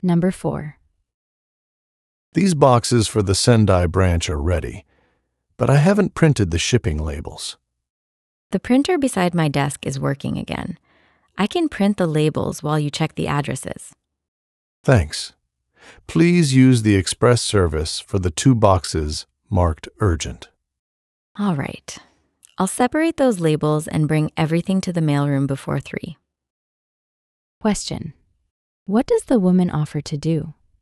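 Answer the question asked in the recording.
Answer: Print the shipping labels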